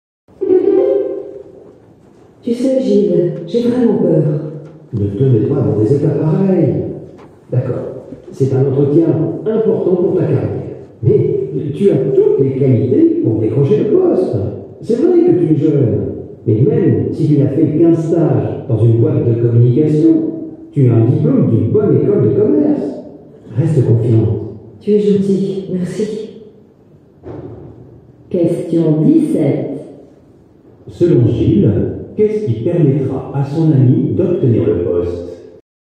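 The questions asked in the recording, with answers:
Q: Selon Gilles, qu'est-ce qui permettra à son ami d'obtenir le poste ?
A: Son diplôme d'une bonne école de commerce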